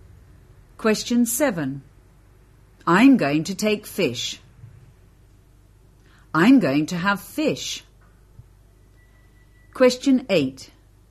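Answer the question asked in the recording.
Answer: B: I'm going to have fish.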